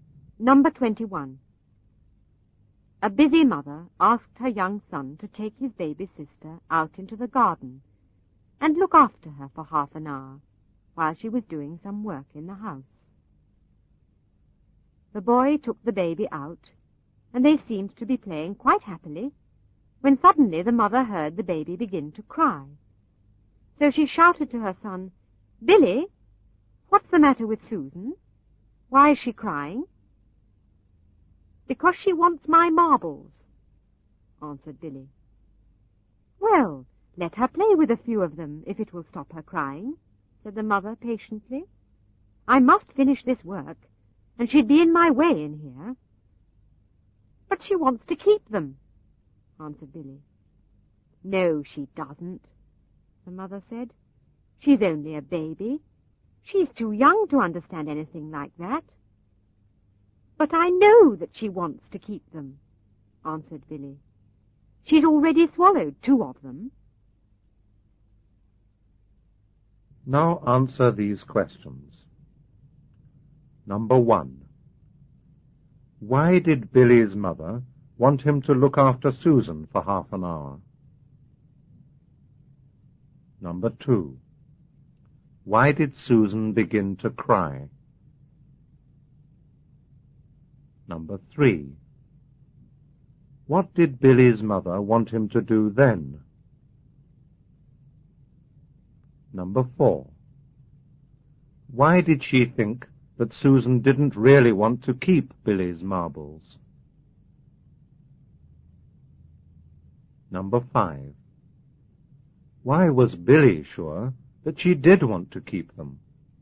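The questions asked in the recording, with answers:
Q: Why did Billy's mother want him to look after Susan for half an hour?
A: Because she was doing some work in the house

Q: Why did Susan begin to cry?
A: Because she wanted Billy's marbles

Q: What did Billy's mother want him to do then?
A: Let Susan play with a few of his marbles

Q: Why did she think that Susan didn't really want to keep Billy's marbles?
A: Because Susan was only a baby and too young to understand that

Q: Why was Billy sure that she did want to keep them?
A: Because she had already swallowed two of them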